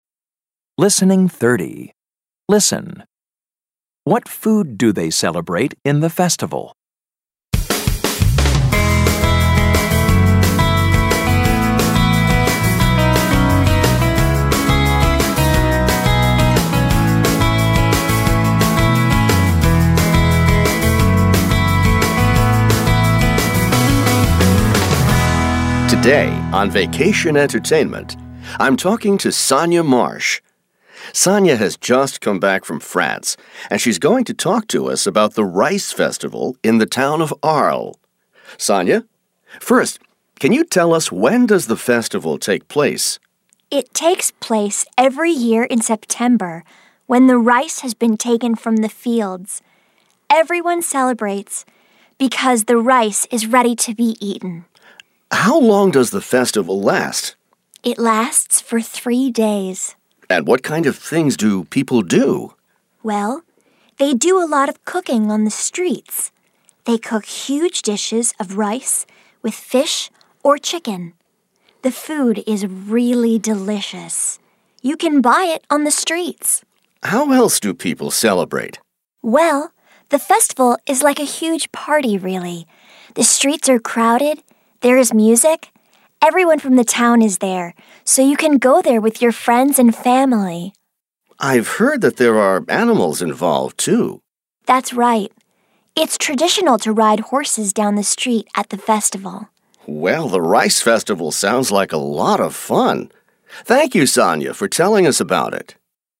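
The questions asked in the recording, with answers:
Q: What food do they celebrate in the festival?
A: Rice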